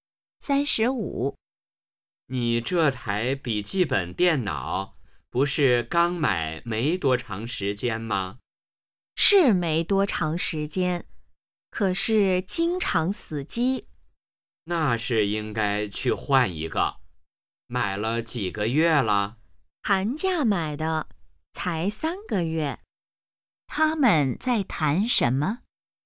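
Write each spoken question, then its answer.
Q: 他们在谈什么?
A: 笔记本电脑(经常死机)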